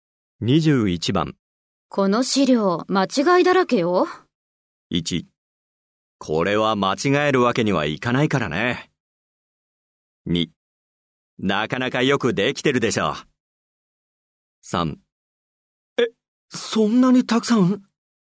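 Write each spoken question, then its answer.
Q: この資料、間違いだらけよ。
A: 3: え、そんなにたくさん?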